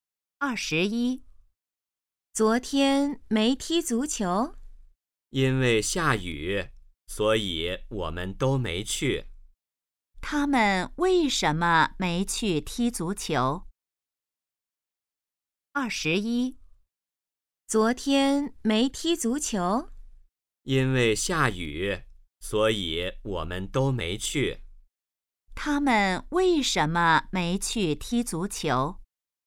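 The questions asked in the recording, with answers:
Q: 他们为什么没去踢足球?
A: 因为下雨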